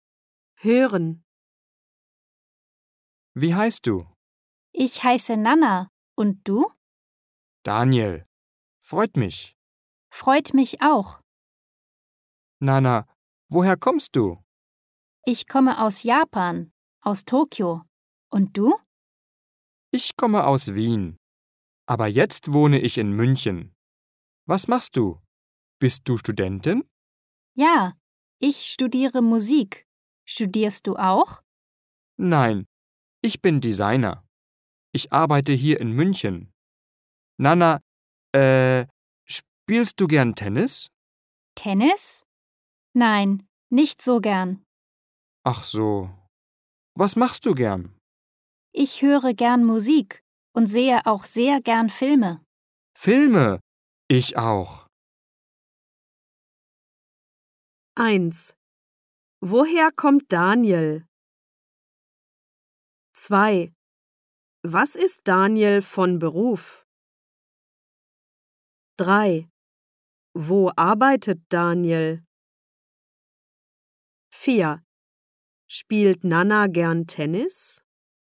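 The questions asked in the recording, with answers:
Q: Woher kommt Daniel?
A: Aus Wien

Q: Was ist Daniel von Beruf?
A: Designer

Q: Wo arbeitet Daniel?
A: In München

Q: Spielt Nana gern Tennis?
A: Nein, nicht so gern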